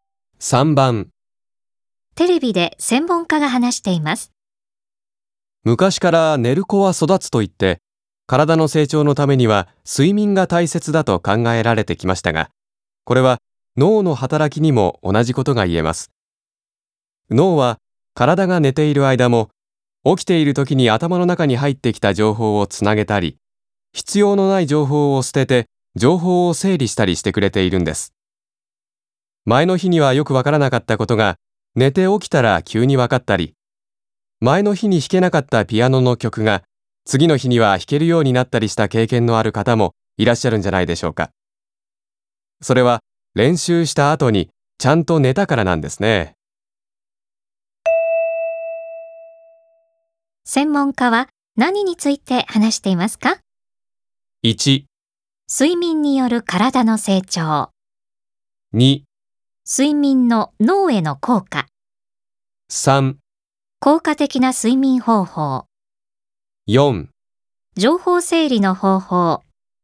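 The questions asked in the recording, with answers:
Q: 専門家は何について話していますか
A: 2: 睡眠の脳への効果。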